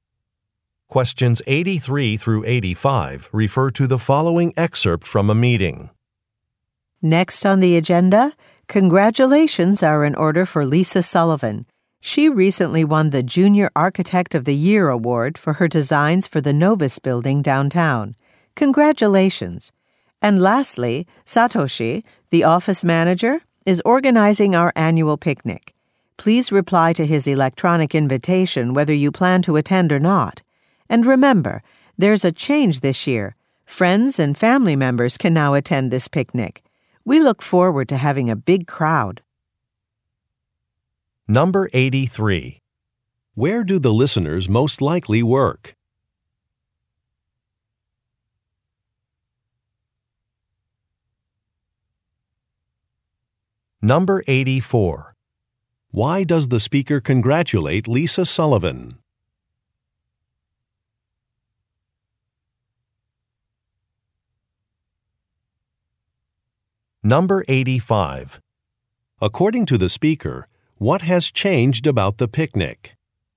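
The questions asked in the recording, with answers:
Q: Where do the listeners most likely work?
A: At an architecture firm

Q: Why does the speaker congratulate Lisa Sullivan?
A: She won an award

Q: According to the speaker, what has changed about the picnic?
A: Friends and family can now attend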